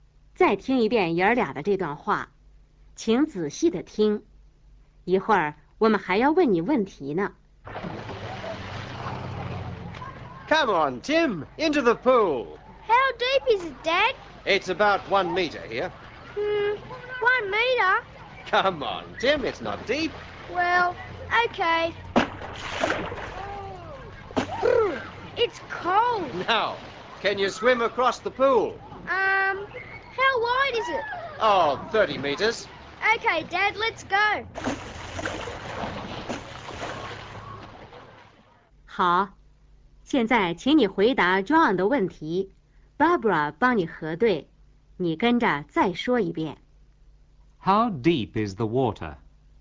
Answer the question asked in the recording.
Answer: 1 meter.